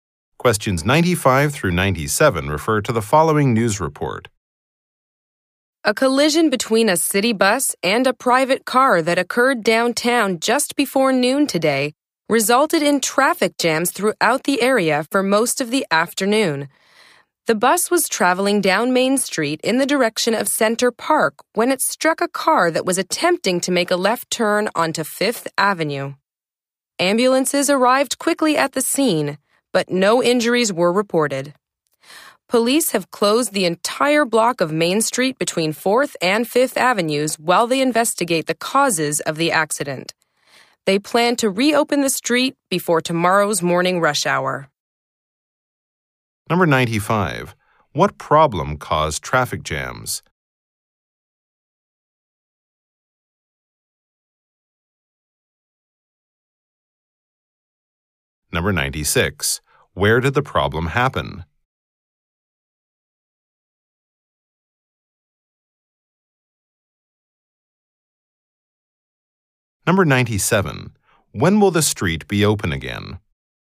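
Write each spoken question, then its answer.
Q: What problem caused traffic jams?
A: A collision between a city bus and a car

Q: Where did the problem happen?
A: On Main Street downtown, at Fifth Avenue

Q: When will the street be open again?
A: Before tomorrow's morning rush hour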